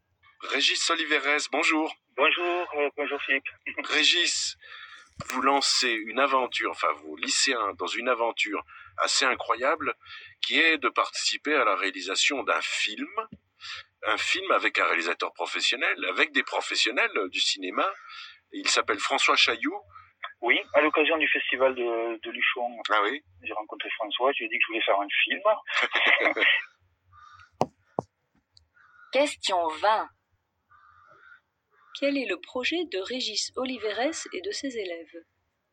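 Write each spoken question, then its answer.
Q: Quel est le projet de Régis Oliveres et de ses élèves ?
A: Participer à la réalisation d'un film avec un réalisateur professionnel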